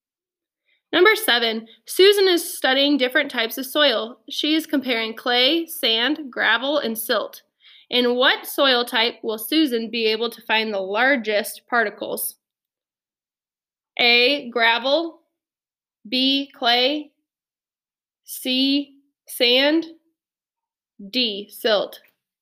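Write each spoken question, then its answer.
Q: In what soil type will Susan be able to find the largest particles?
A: A: gravel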